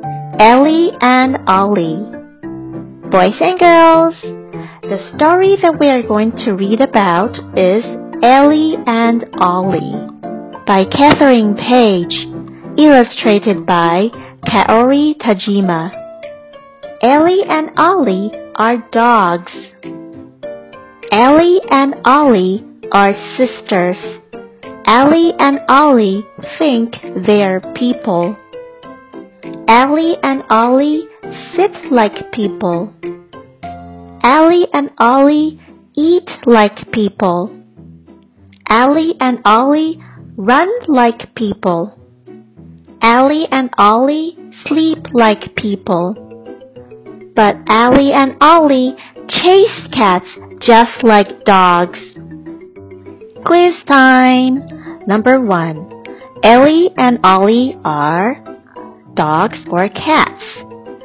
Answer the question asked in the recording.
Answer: The answer is dogs.